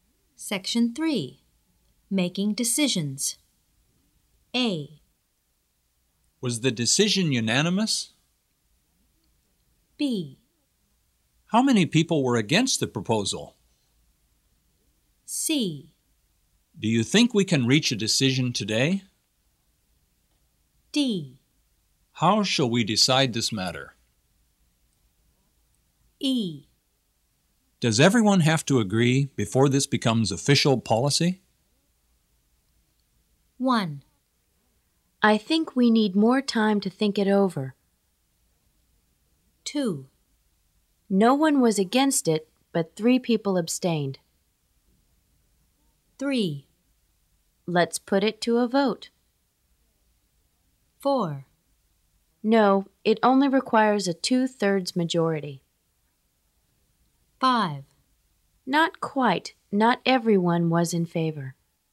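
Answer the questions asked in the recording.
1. C: Do you think we can reach a decision today?
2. B: How many people were against the proposal?
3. D: How shall we decide this matter?
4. E: Does everyone have to agree before this becomes official policy?
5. A: Was the decision unanimous?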